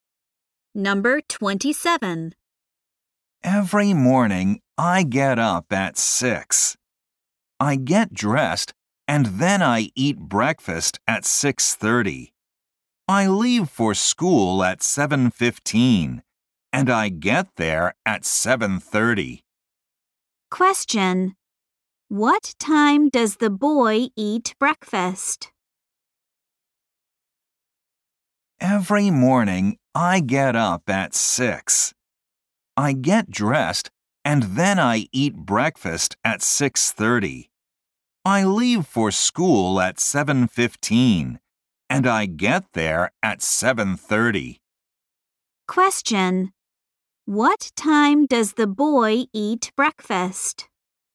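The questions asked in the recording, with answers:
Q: What time does the boy eat breakfast?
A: At 6:30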